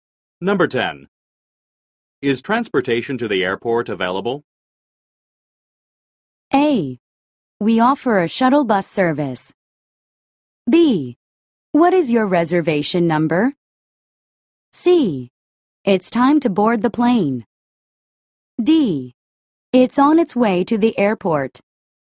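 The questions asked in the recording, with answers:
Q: Is transportation to the airport available?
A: A: We offer a shuttle bus service.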